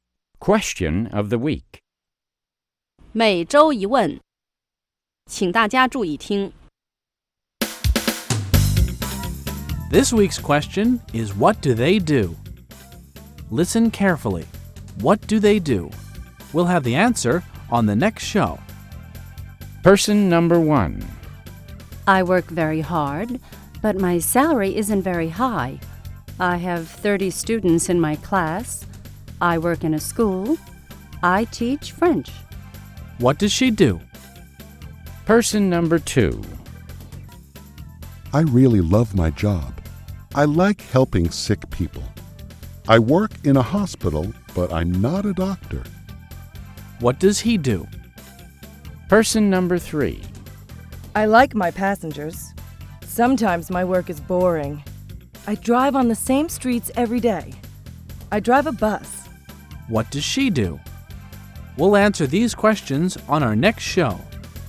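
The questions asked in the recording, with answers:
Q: What does she do?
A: She's a (French) teacher.

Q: What does she do?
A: She's a bus driver.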